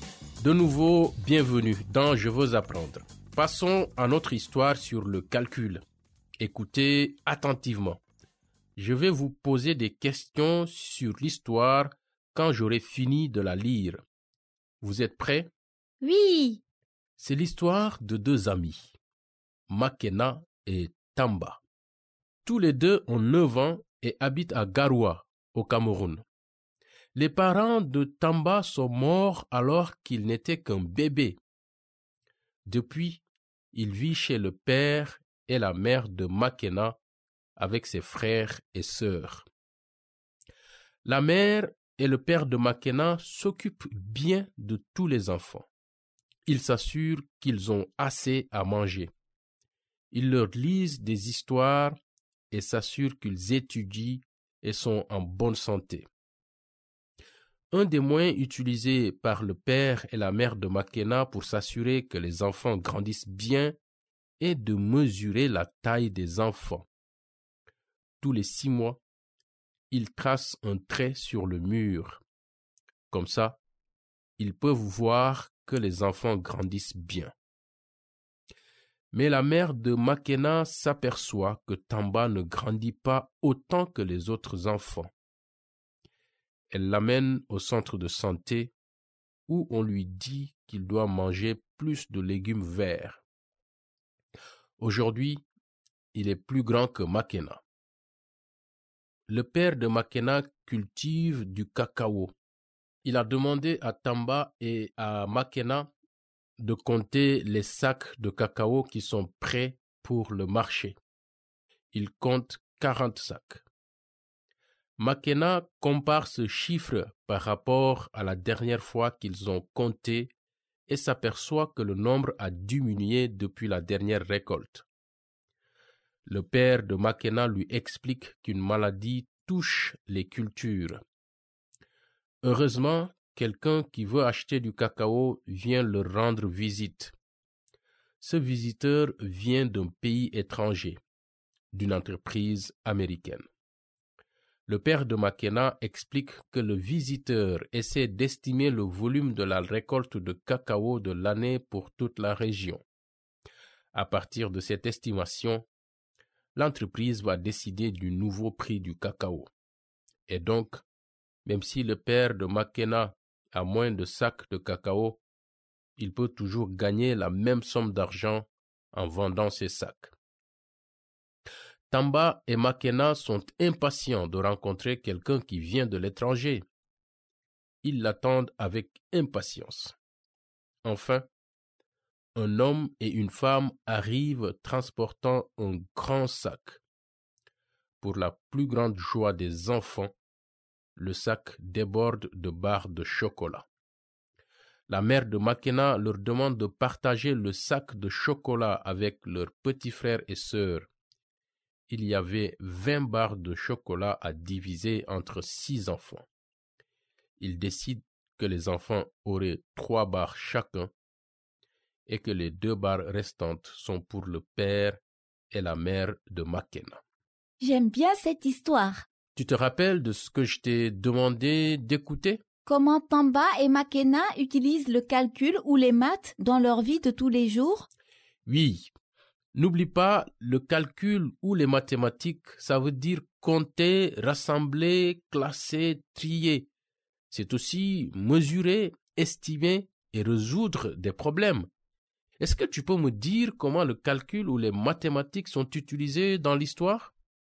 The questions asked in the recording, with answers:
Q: Est-ce que tu peux me dire comment le calcul ou les mathématiques sont utilisés dans l'histoire?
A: Ils utilisent les maths pour compter les sacs de cacao prêts pour le marché.